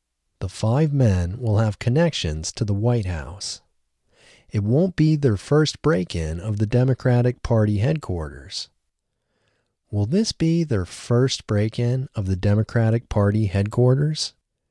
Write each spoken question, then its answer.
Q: Will this be their first break-in of the Democratic Party headquarters?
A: No, it won't be their first break-in of the Democratic Party headquarters.